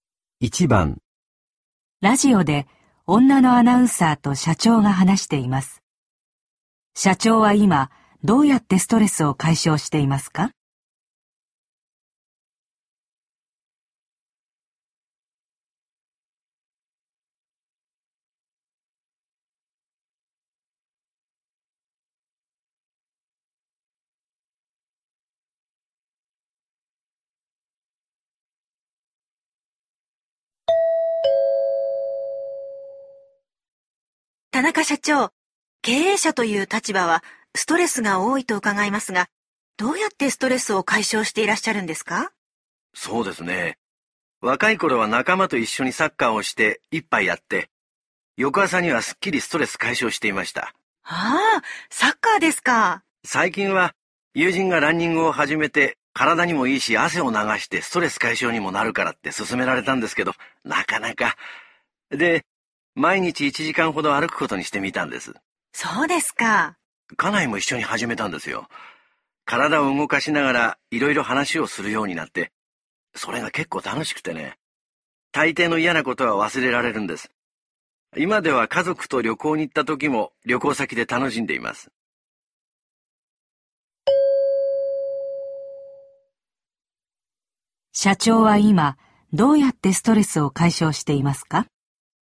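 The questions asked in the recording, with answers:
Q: 社長は今どうやってストレスを解消していますか?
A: 毎日奥さんと一緒に歩いている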